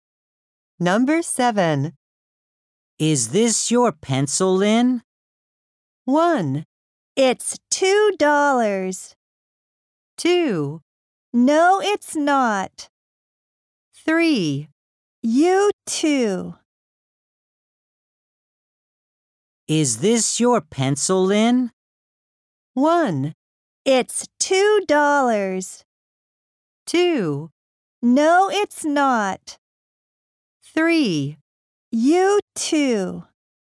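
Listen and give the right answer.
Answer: 2: No, it's not.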